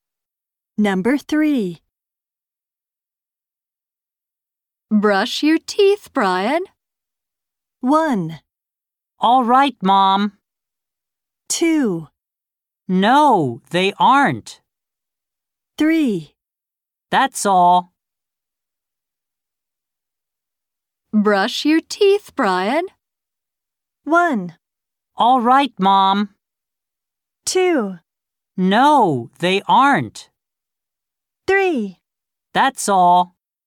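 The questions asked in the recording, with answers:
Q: Brush your teeth, Brian.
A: 1: All right, Mom.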